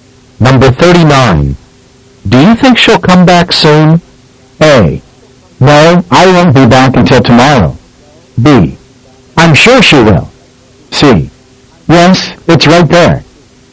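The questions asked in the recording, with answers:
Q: Do you think she'll come back soon?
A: B: I'm sure she will.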